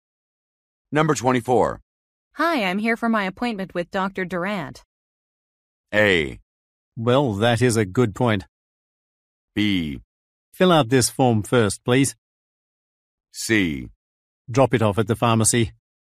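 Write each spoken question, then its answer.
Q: Hi, I'm here for my appointment with Dr.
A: B: Fill out this form first, please.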